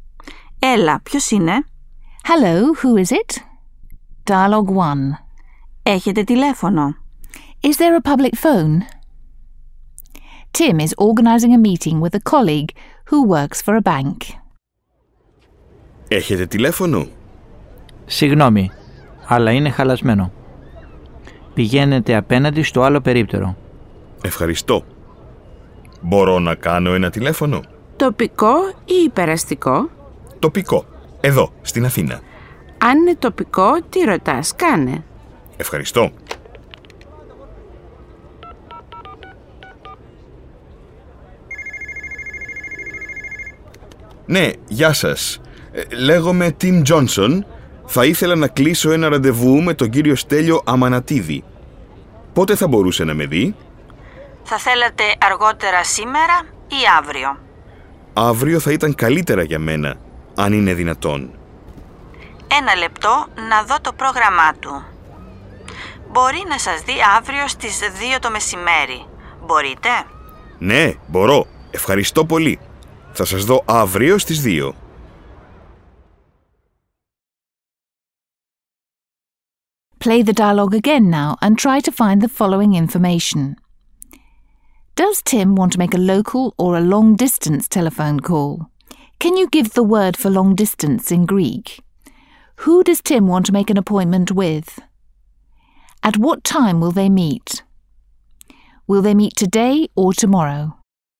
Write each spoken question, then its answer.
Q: Does Tim want to make a local or a long distance telephone call?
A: He wants to make a local telephone call.

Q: Can you give the word for long distance in Greek?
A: υπεραστικό

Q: Who does Tim want to make an appointment with?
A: Mr. Stelios Amanatidis